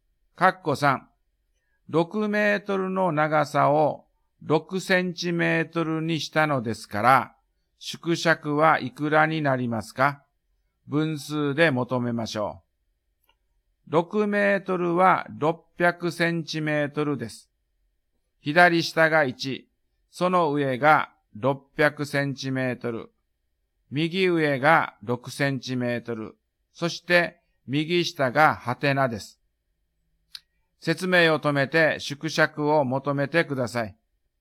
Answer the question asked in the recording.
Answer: 縮尺は100分の1になりましたね。